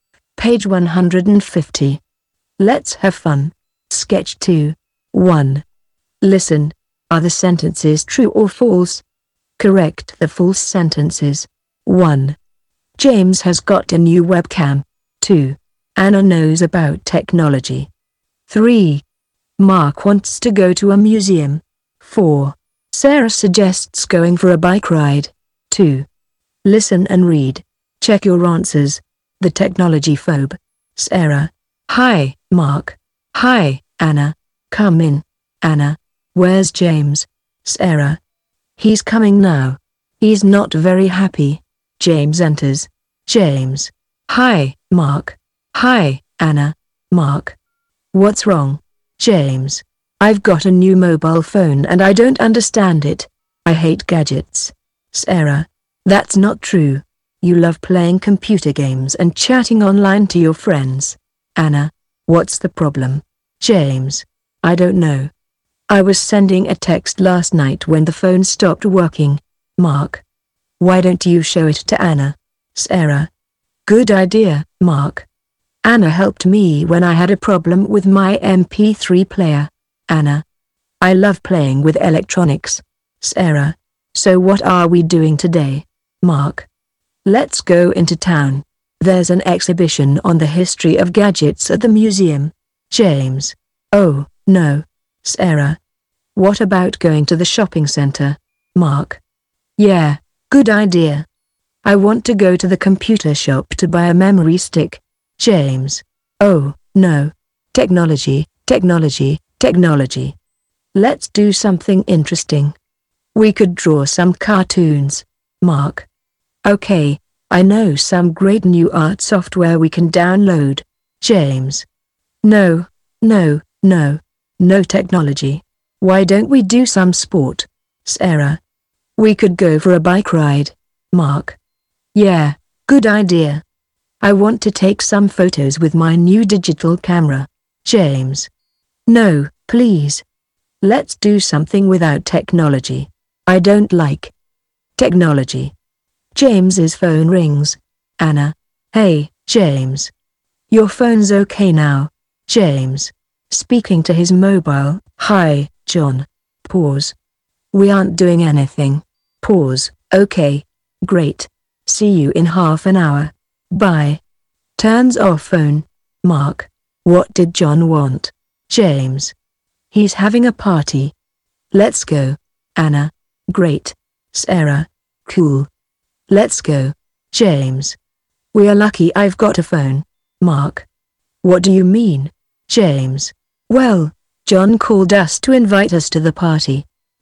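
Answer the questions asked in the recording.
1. False: James has got a new mobile phone.
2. True
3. True
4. True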